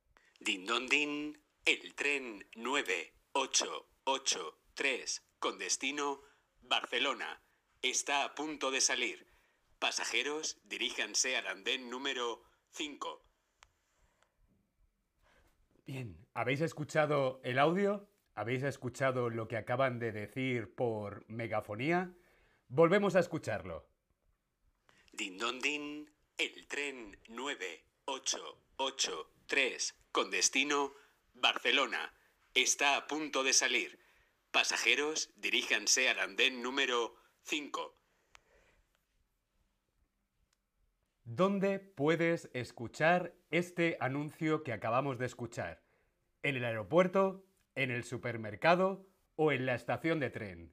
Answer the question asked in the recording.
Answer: yo estoy en la estación de tren